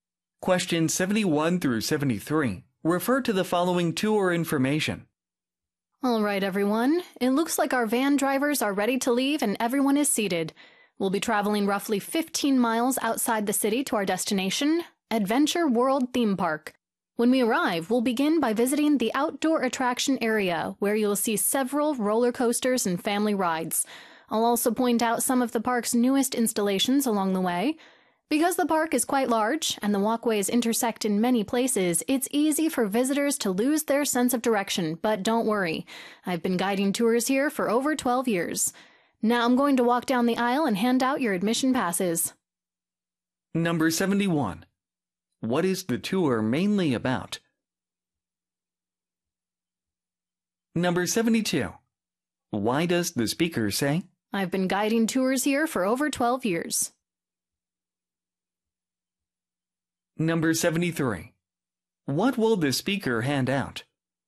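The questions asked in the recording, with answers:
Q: What is the tour mainly about?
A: A visit to Adventure World Theme Park

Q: Why does the speaker say? I've been guiding tours here for over 12 years.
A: Reassure 들리면 정답이라 그랬죠.

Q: What will the speaker hand out?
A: Admission passes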